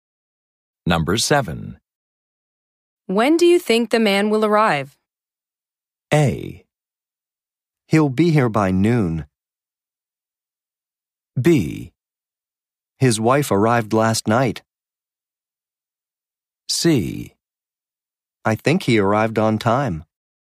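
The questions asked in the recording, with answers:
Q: When do you think the man will arrive?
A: A: He'll be here by noon.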